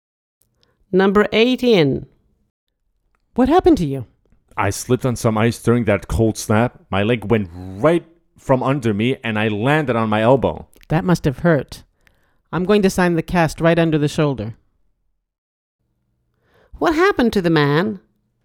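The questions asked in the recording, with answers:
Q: What happened to the man?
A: he slipped on ice and broke his arm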